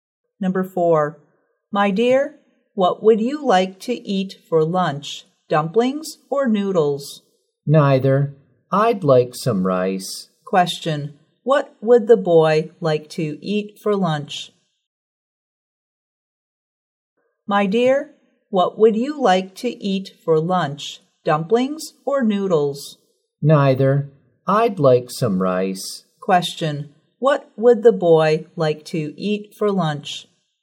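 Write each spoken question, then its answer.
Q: What would the boy like to eat for lunch?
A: Rice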